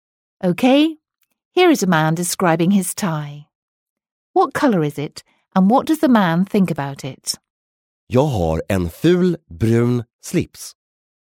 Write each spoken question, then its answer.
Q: What color is it and what does the man think about it?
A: No, because he said that he has an ugly brown tie.